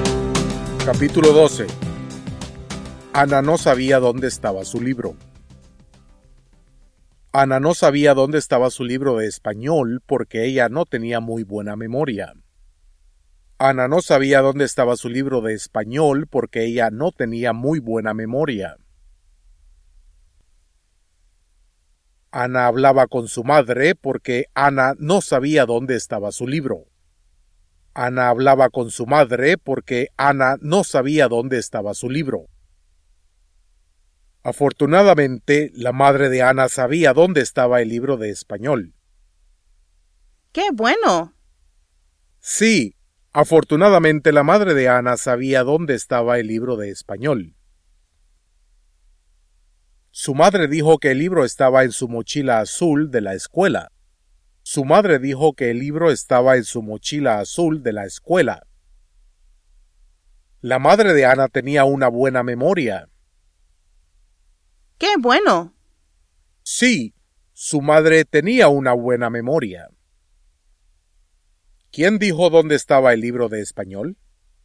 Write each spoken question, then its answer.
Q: ¿Quién dijo dónde estaba el libro de español?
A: La madre de Ana dijo dónde estaba el libro.